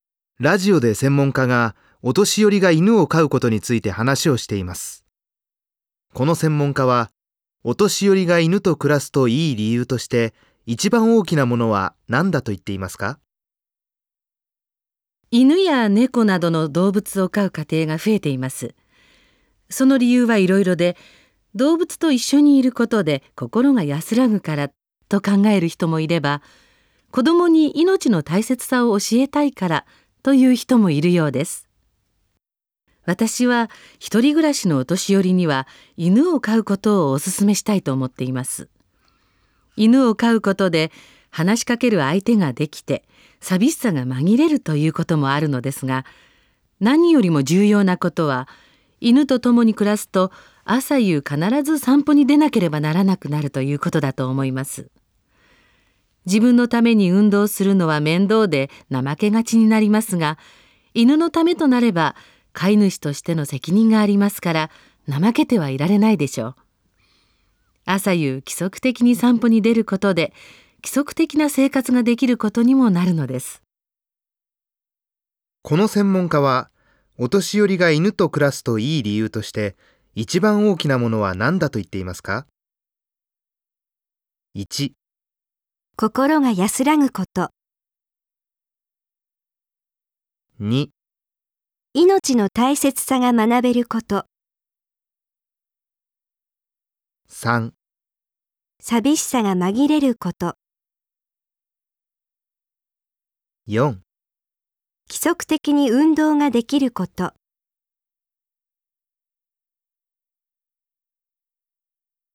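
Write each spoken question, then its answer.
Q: この専門家はお年寄りが犬と暮らすといい理由として一番大きなものは何だと言っていますか?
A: 4: 規則的に運動ができること。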